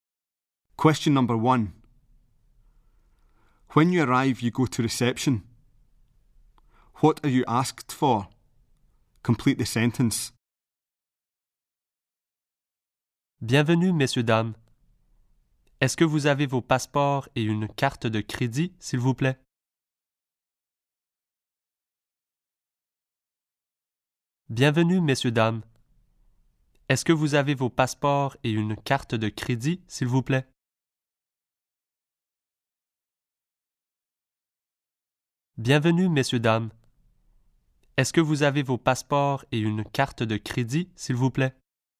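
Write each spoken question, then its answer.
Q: What are you asked for?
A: Passports and a credit card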